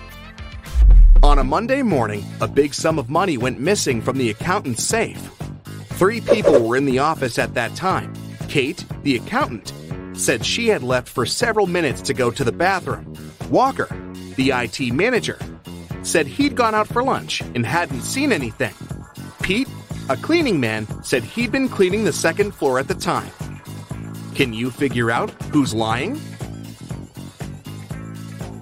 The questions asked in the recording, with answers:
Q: Can you figure out who's lying?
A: It's Walker. He said he'd been on his lunch break, but it was still morning at that time.